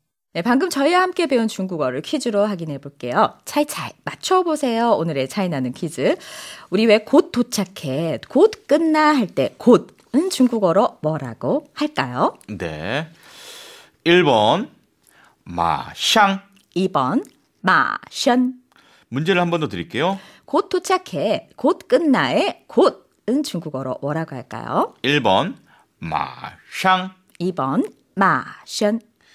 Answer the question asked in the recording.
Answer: 정답은요. 많이 쓰는 표현이죠. 1번 마샹.